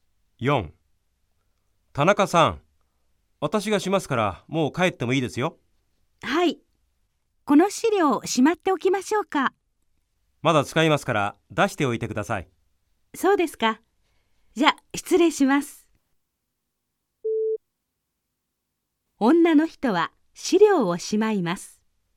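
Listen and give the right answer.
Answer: ×(正しくない)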